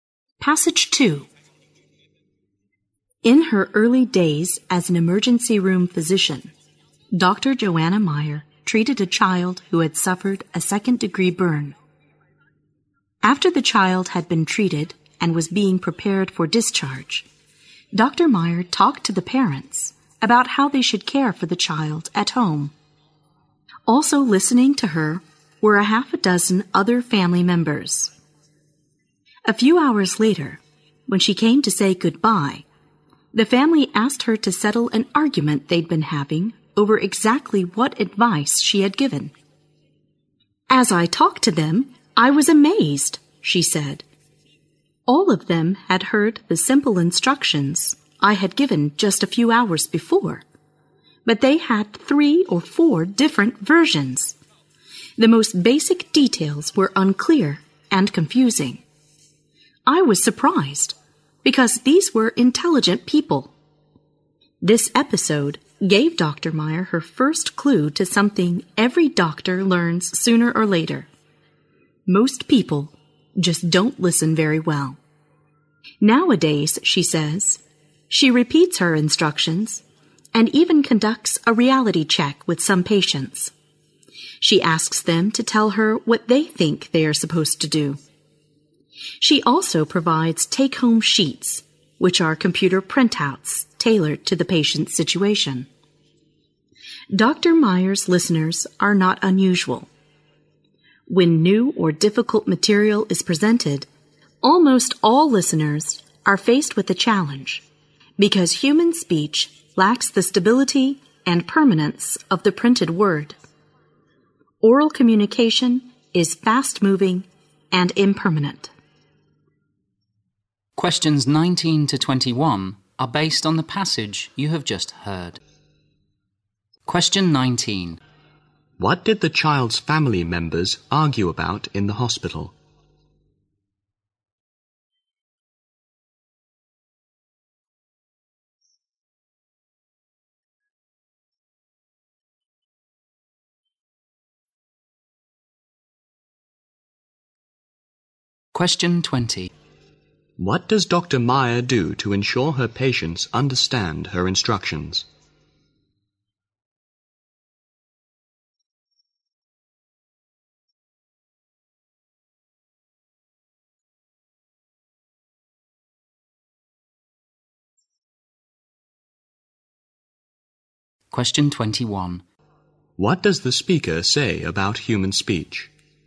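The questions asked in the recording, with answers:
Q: What did the child's family members argue about in the hospital?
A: What advice the doctor had given for caring for the child

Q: What does Dr. Meyer do to ensure her patients understand her instructions?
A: Repeats instructions, asks them to say what to do, gives take-home sheets

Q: What does the speaker say about human speech?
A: It lacks the stability and permanence of the printed word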